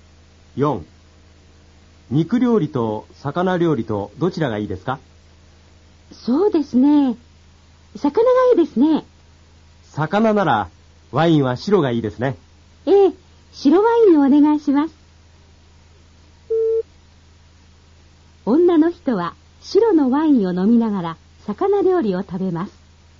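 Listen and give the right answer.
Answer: 正しい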